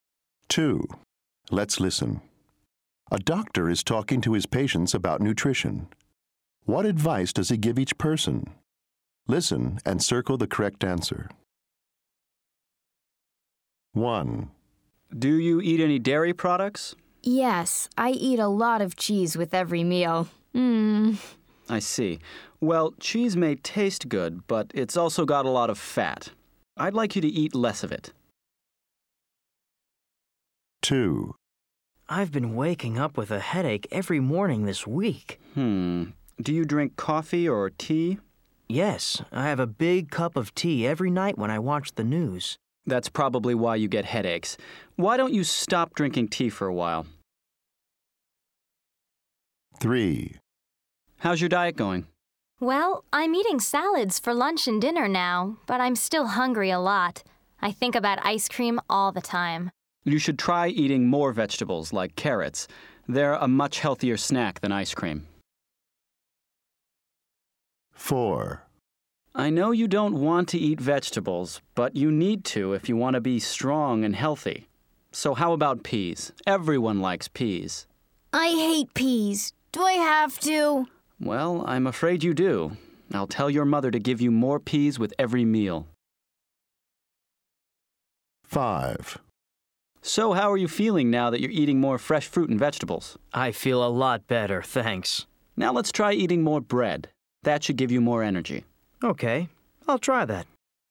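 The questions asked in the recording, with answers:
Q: What advice does he give each person?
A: Eat less cheese

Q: What advice does he give each person?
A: Stop drinking tea for a while

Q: What advice does he give each person?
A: Eat more vegetables, like carrots, instead of ice cream

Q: What advice does he give each person?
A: Eat more peas

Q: What advice does he give each person?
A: Eat more bread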